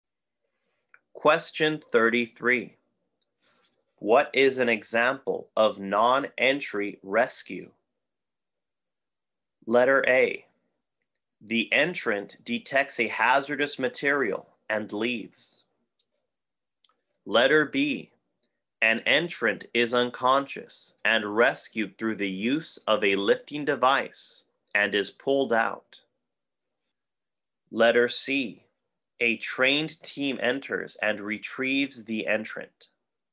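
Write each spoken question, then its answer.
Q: What is an example of non-entry rescue?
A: B: An entrant is unconscious and rescued through the use of a lifting device and is pulled out.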